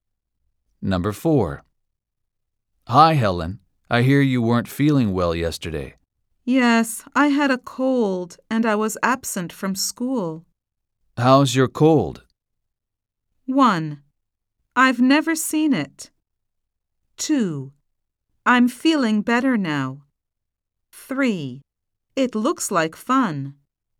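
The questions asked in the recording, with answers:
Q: How's your cold?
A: 2: I'm feeling better now.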